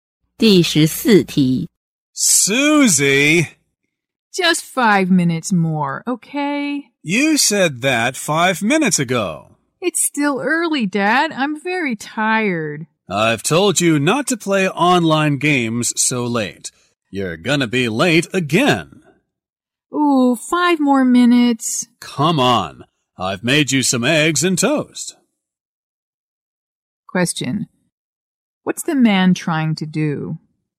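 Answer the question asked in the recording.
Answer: Wake his daughter Susie up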